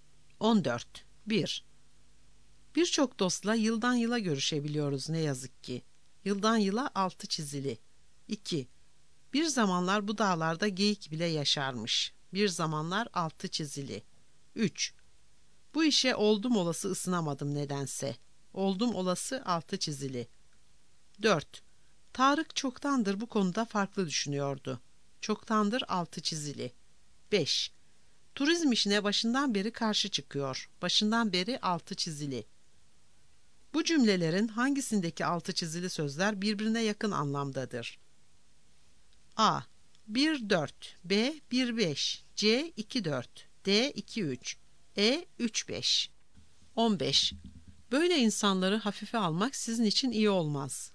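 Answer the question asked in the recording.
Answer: E: 3-5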